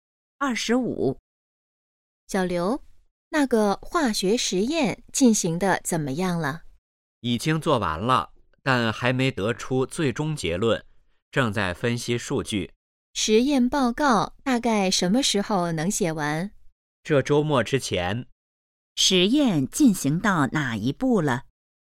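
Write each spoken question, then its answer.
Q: 实验进行到哪一步了?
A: 正在分析数据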